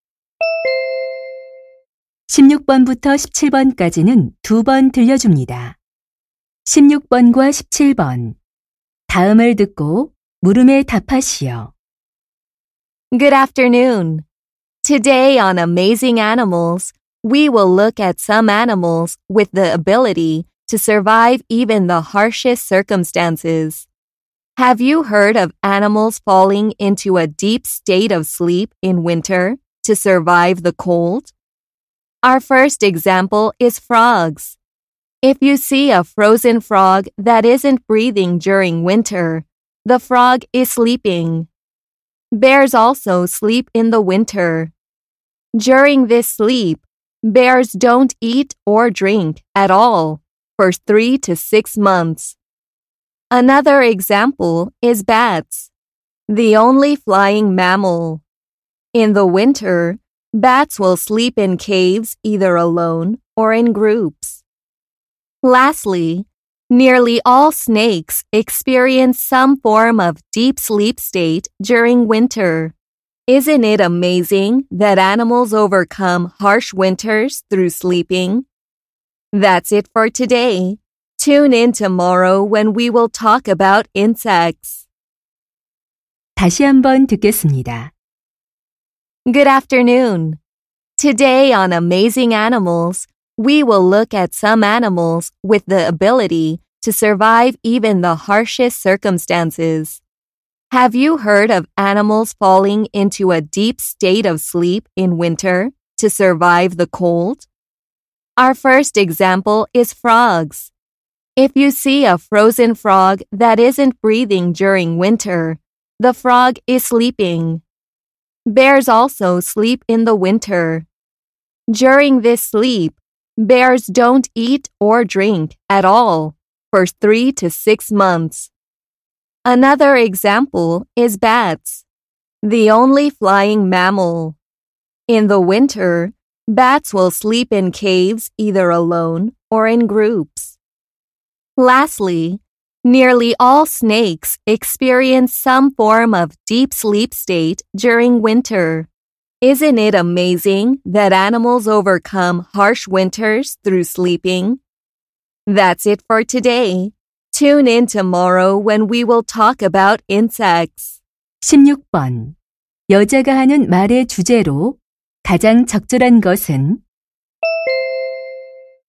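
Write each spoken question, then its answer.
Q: 여자가 하는 말의 주제로 가장 적절한 것은?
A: 겨울잠을 자며 혹독한 겨울을 이겨내는 동물들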